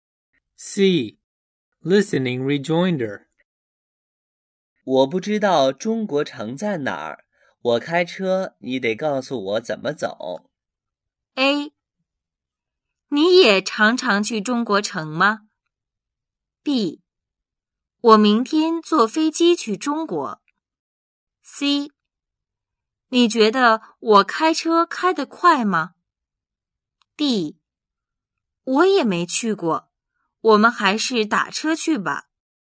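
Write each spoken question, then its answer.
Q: 我不知道中国城在哪儿,我开车,你得告诉我怎么走。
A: D: 我也没去过。我们还是打车去吧。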